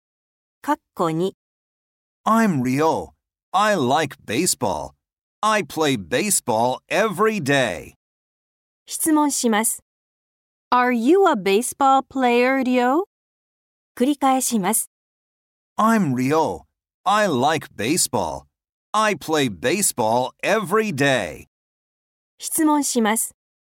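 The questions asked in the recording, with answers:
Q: Are you a baseball player, Ryo?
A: Yes, I am.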